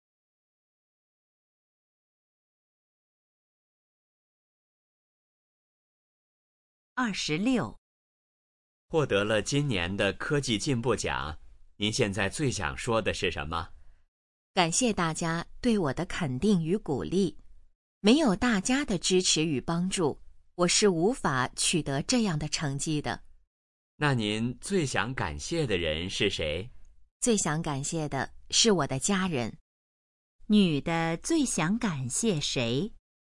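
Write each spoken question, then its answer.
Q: 女的最想感谢谁?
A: 她的家人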